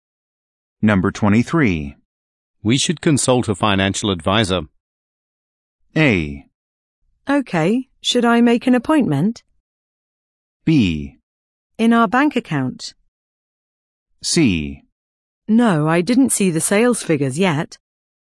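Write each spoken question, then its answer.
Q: We should consult a financial advisor.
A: A: Okay, should I make an appointment?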